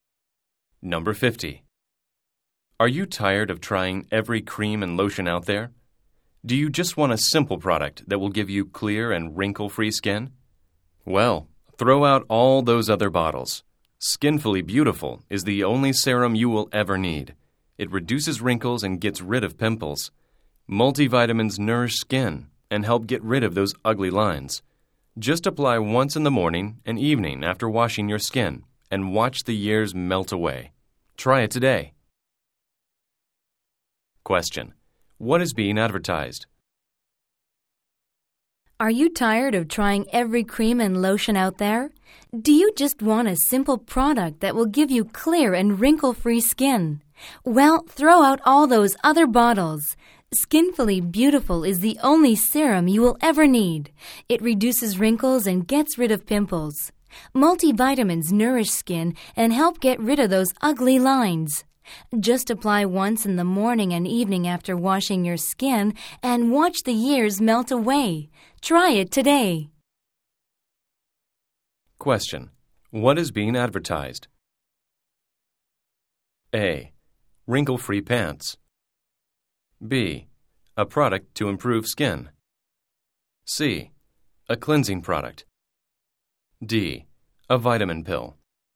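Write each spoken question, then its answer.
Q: What is being advertised?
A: B: A product to improve skin.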